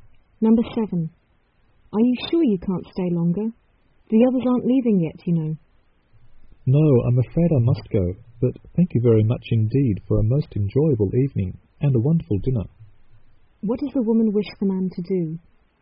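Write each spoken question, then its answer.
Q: What does the woman wish the man to do?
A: Stay longer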